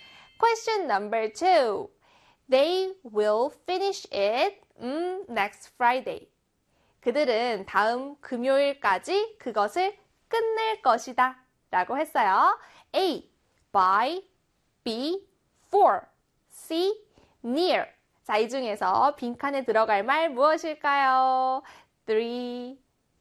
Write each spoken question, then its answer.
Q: A, by, B, for, C, near. 자, 이 중에서 빈칸에 들어갈 말 무엇일까요?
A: 그렇습니다. A에 by가 들어가는 거 맞죠?